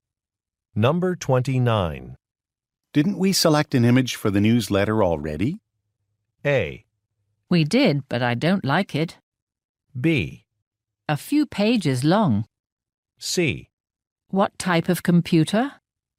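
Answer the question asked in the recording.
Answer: A: We did, but I don't like it.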